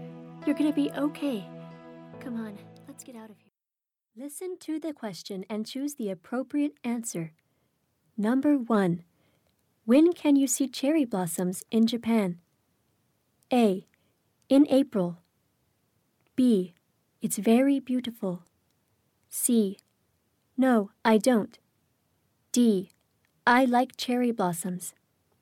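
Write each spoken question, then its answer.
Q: When can you see cherry blossoms in Japan?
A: A: In April.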